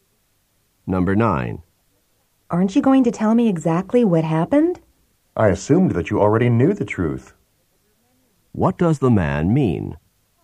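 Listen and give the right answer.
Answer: He thought the woman already knew what happened.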